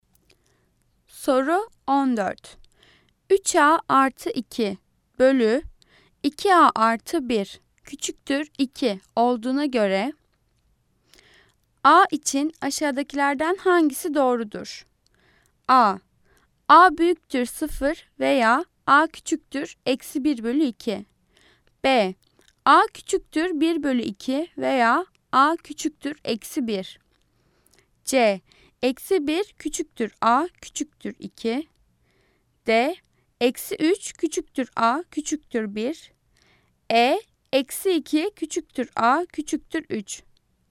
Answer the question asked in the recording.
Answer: Cevap A. A büyüktür 0 veya a küçüktür eksi 1 bölü 2.